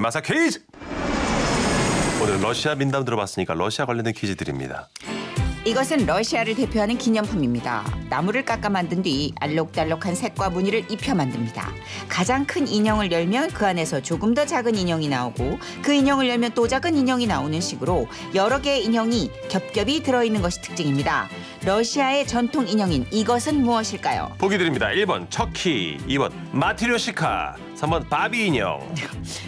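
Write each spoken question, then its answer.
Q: 러시아의 전통 인형인 이것은 무엇일까요?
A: 2번: 마티료시카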